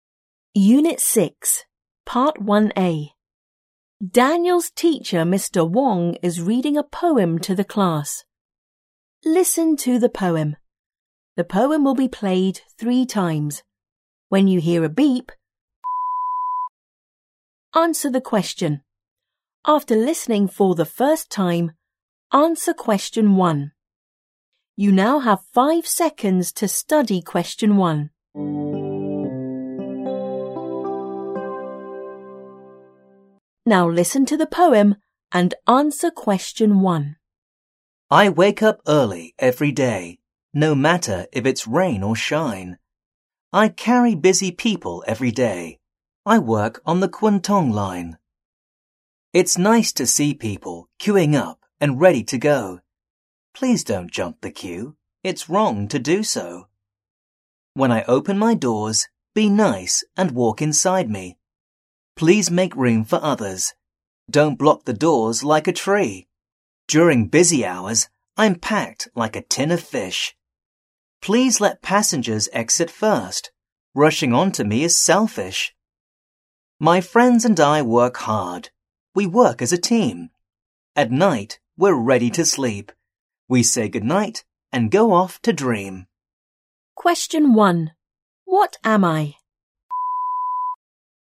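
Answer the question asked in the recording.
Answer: A train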